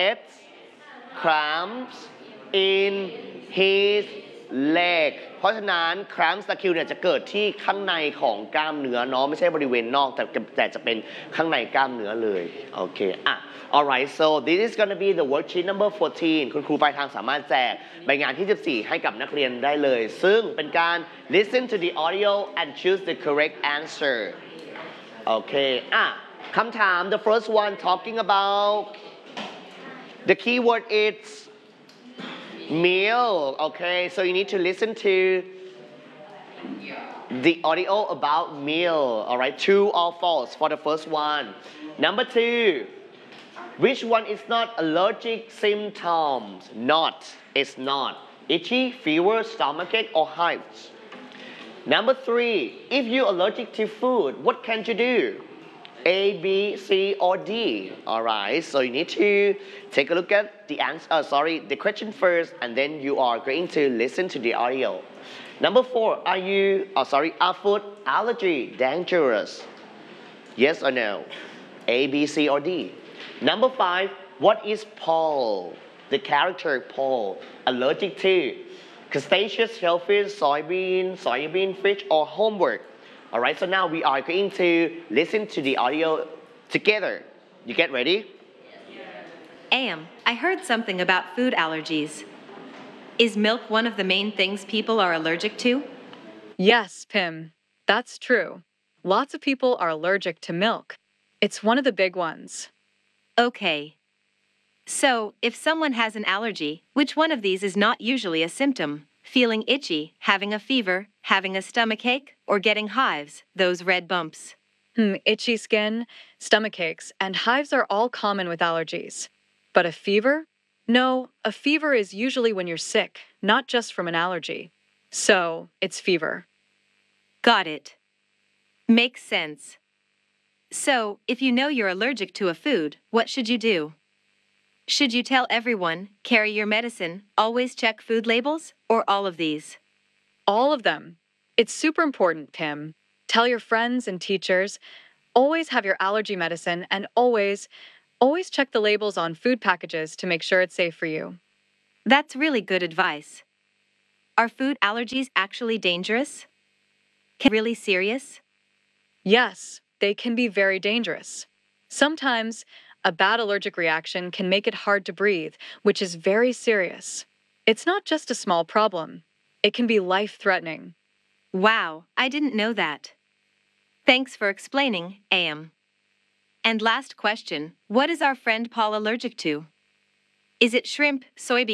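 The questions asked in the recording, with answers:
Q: which one is not allergic symptoms?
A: fever

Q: if you're allergic to food, what can you do?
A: all of these (tell everyone, carry your medicine, check food labels)

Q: are food allergy dangerous?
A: Yes, they can be very dangerous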